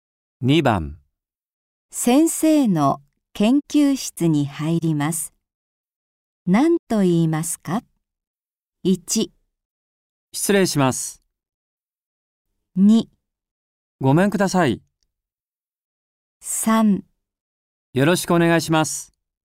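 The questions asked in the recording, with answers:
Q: 先生の研究室に入ります。何と言いますか ?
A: 1: 失礼します。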